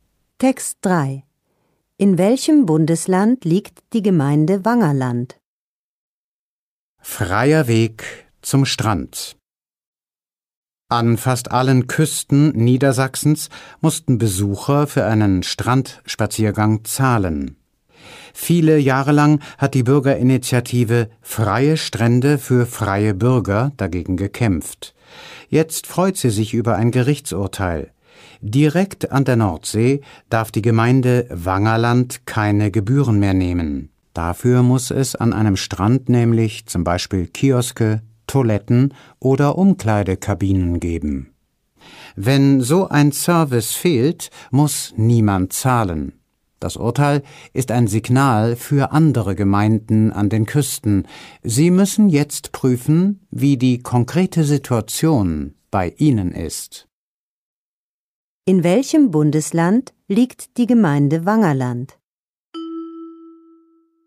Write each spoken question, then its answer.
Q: In welchem Bundesland liegt die Gemeinde Wangerland?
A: Wangerland liegt in Niedersachsen.